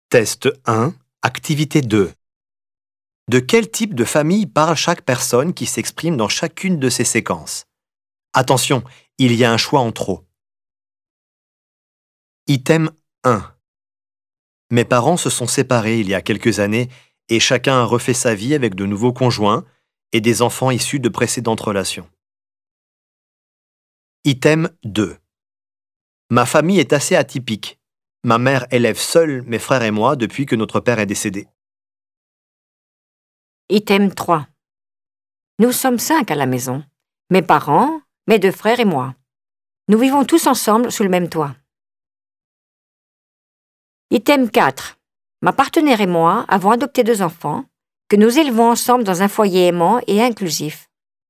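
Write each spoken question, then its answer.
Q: De quel type de famille parle chaque personne qui s'exprime dans chacune de ces séquences?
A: famille recomposée

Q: De quel type de famille parle chaque personne qui s'exprime dans chacune de ces séquences?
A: famille monoparentale

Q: De quel type de famille parle chaque personne qui s'exprime dans chacune de ces séquences?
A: famille nucléaire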